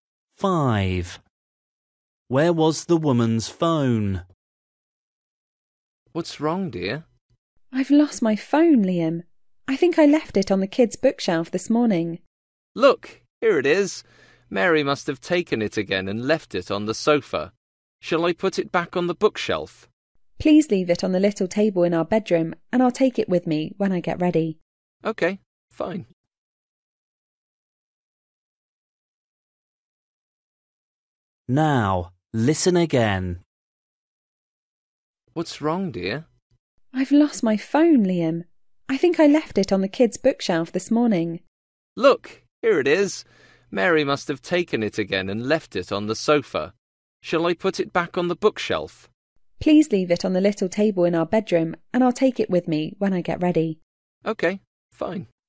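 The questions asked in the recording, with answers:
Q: Where was the woman's phone?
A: On the sofa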